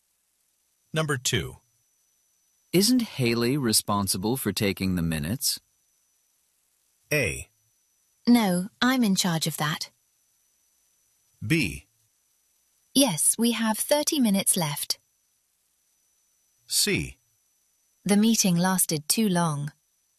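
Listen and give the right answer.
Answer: A: No, I'm in charge of that.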